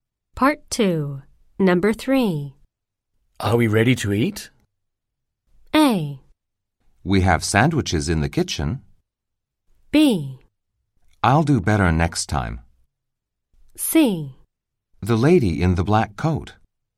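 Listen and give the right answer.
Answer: A: We have sandwiches in the kitchen.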